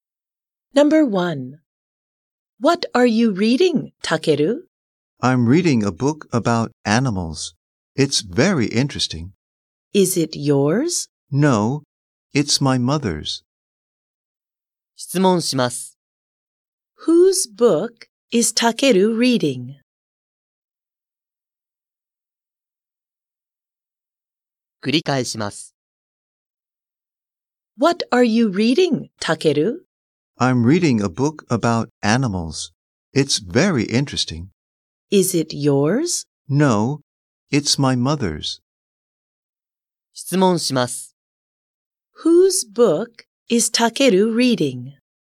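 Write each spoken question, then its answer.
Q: Whose book is Takeru reading?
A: His mother's.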